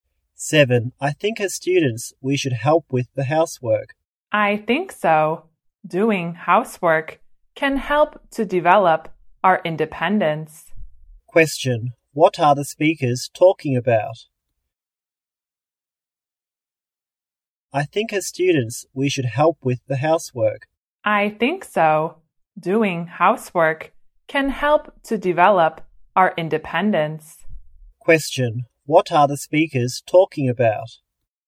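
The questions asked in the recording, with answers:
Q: What are the speakers talking about?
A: Students helping with housework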